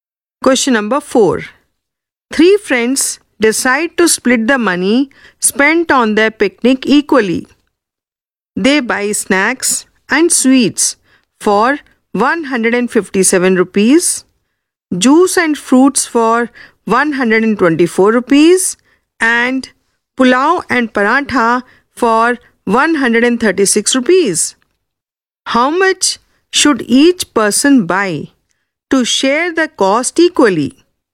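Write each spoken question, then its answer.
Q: How much should each person buy to share the cost equally?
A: 139 rupees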